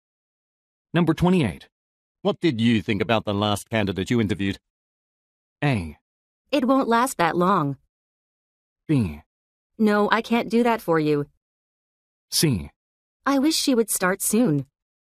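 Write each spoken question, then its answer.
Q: What did you think about the last candidate you interviewed?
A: C: I wish she would start soon.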